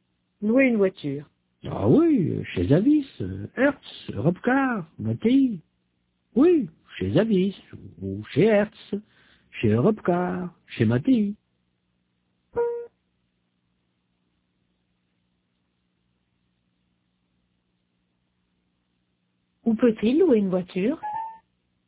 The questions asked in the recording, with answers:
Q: Où peut-il louer une voiture?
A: Chez Avis, Hertz, Robcar, Matéi.